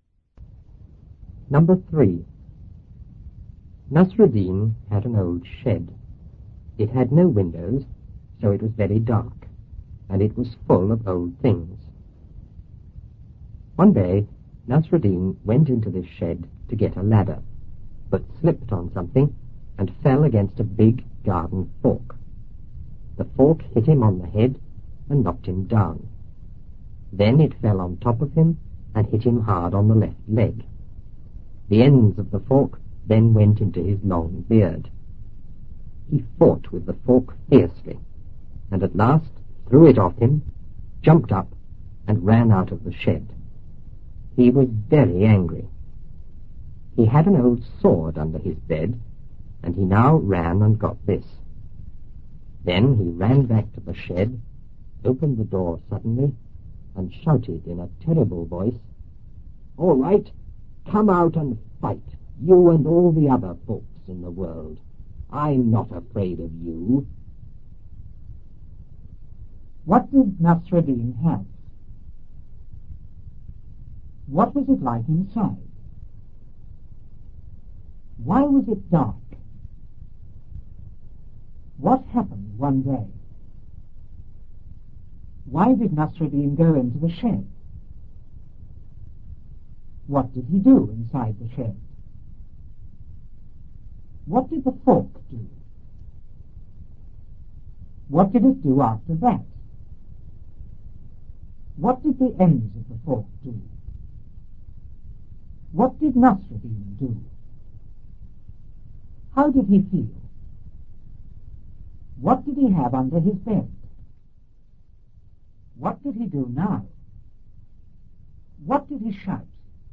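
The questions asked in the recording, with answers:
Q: What did Nasruddin have?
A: An old shed

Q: What was it like inside?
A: Very dark and full of old things

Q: Why was it dark?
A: It had no windows

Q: What happened one day?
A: Nasruddin went into the shed, slipped and fell against a big garden fork

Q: Why did Nasruddin go into the shed?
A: To get a ladder

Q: What did he do inside the shed?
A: He slipped on something and fell against a garden fork

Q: What did the fork do?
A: It hit him on the head and knocked him down

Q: What did it do after that?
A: It fell on top of him and hit him hard on the left leg

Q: What did the ends of the fork do?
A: They went into his long beard

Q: What did Nasruddin do?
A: He fought with the fork, threw it off, jumped up and ran out of the shed

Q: How did he feel?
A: Very angry

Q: What did he have under his bed?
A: An old sword

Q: What did he do now?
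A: He got the sword, ran back to the shed and opened the door suddenly

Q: What did he shout?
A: "All right! Come out and fight, you and all the other folks in the world. I'm not afraid of you."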